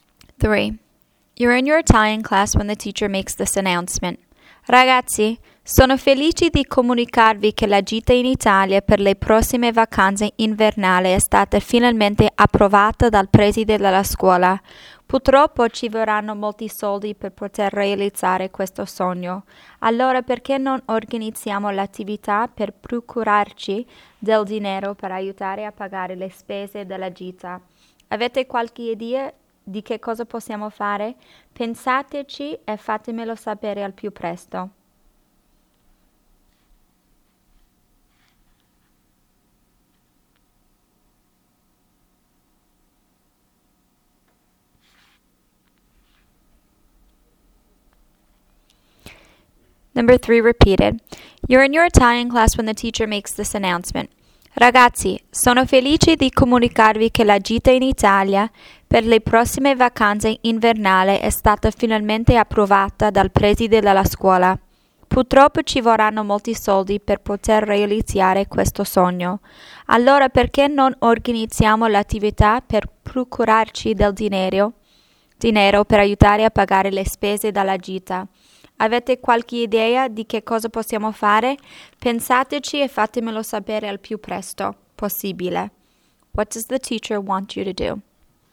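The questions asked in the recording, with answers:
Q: What does the teacher want you to do?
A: Suggest ideas for raising money to help pay for the trip to Italy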